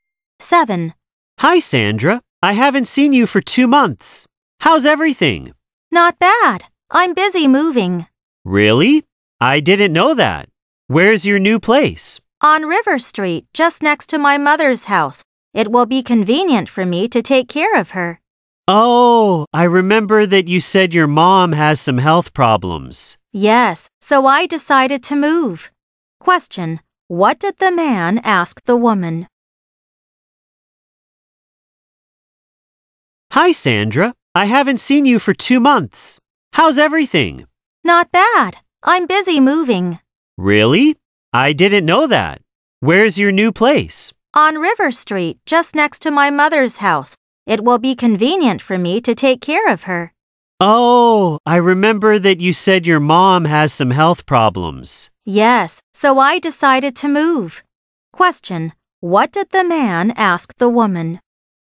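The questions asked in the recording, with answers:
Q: what did the man ask the woman?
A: Where her new place is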